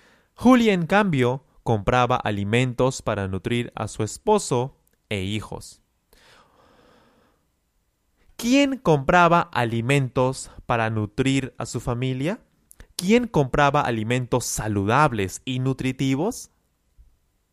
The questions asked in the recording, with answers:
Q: ¿Quién compraba alimentos para nutrir a su familia?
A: Julia. Julia compraba alimentos para nutrir a su familia.